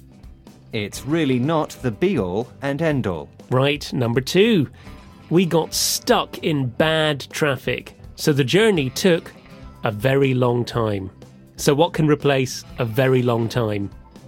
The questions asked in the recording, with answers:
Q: So what can replace a very long time?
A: The journey took forever and a day.